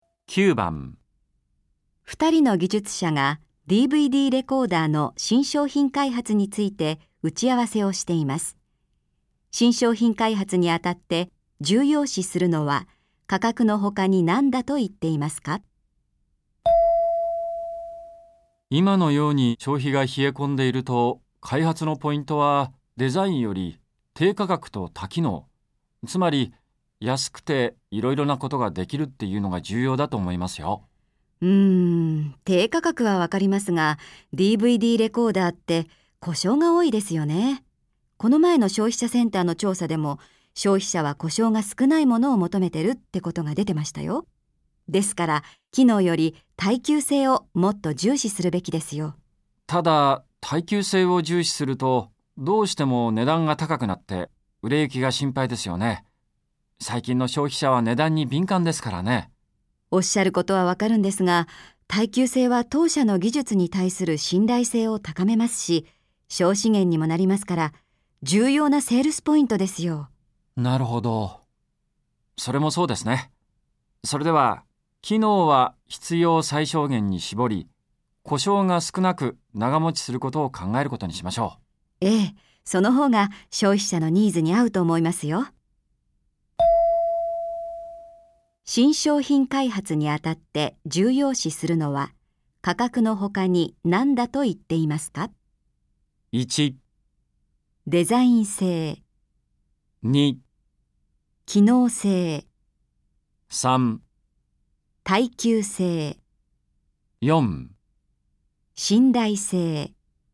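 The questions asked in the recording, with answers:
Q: 新商品開発にあたって重要視するのは価格の他に何だと言っていますか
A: 3: 耐久性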